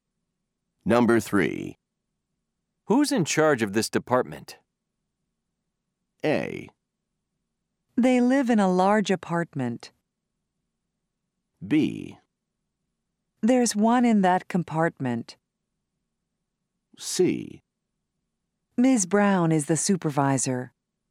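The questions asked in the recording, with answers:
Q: Who's in charge of this department?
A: C: Ms. Brown is the supervisor.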